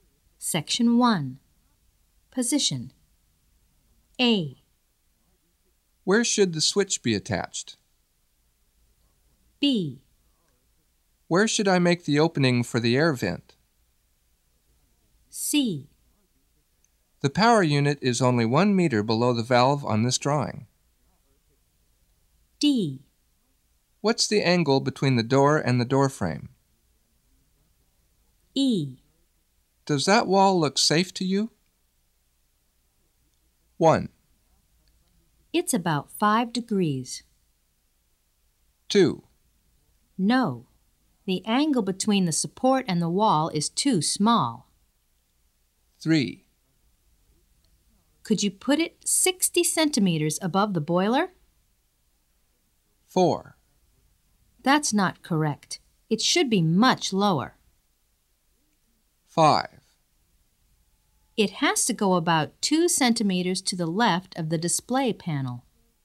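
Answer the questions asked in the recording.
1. 5: It has to go about 2 centimeters to the left of the display panel.
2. 3: Could you put it 60 centimeters above the boiler?
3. 4: That's not correct. It should be much lower.
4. 1: It's about 5 degrees.
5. 2: No, the angle between the support and the wall is too small.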